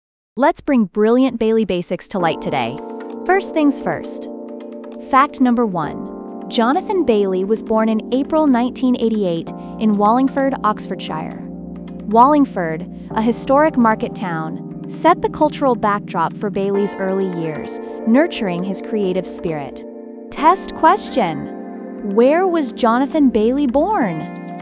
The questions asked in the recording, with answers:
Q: Where was Jonathan Bailey born?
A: Correct answer. Wallingford.